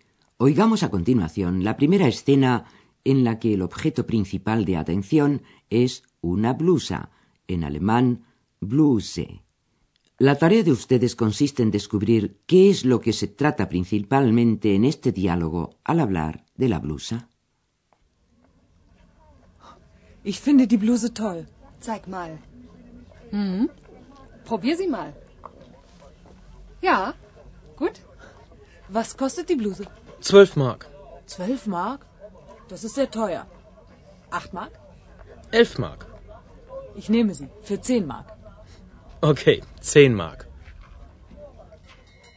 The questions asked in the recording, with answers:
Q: La tarea de ustedes consiste en descubrir qué es lo que se trata principalmente en este diálogo al hablar de la blusa.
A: Lo principal, como lo habrán advertido con toda seguridad, era el regateo sobre el precio de la blusa.